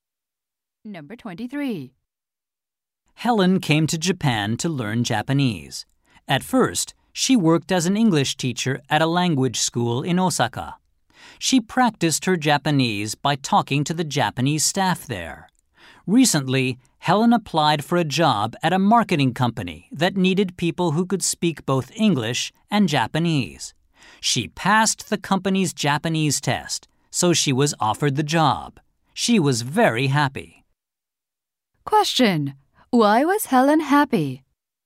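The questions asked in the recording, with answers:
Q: Why was Helen happy?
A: She was offered a job at a marketing company.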